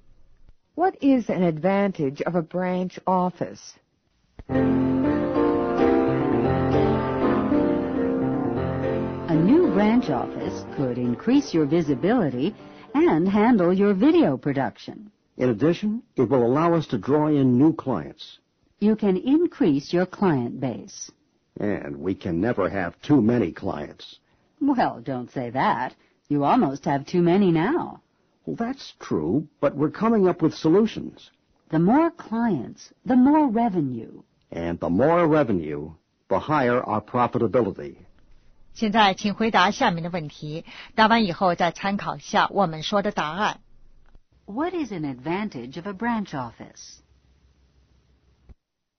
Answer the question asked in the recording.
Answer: It will increase visibility, handle video production,and attract new clients.